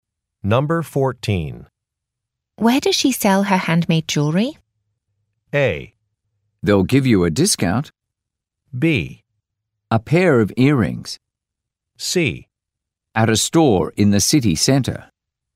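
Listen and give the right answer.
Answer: C: At a store in the city center.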